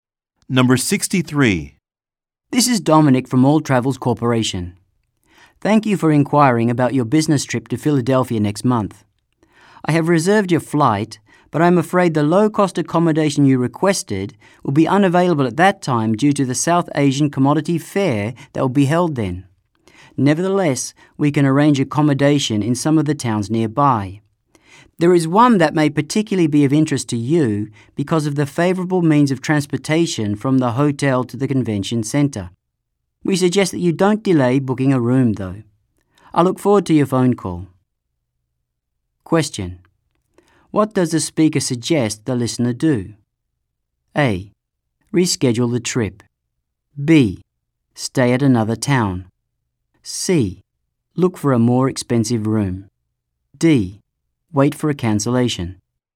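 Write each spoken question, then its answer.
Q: What does the speaker suggest the listener do?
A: B: Stay at another town.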